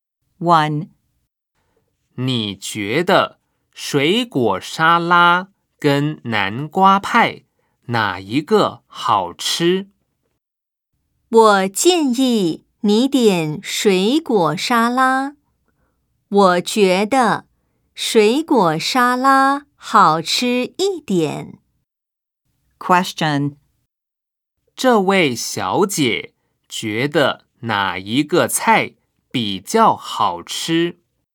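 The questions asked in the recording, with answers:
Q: 这位小姐觉得哪一个菜比较好吃?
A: 水果沙拉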